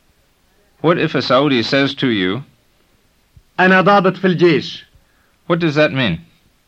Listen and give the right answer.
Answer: It means I'm an officer in the army.